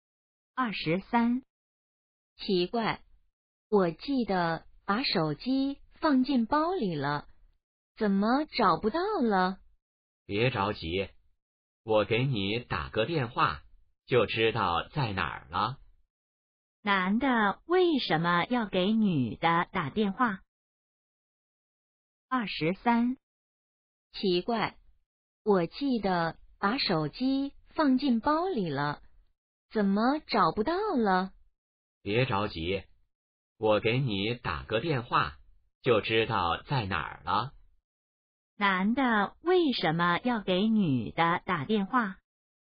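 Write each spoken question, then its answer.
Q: 男的为什么要给女的打电话?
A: 帮她找手机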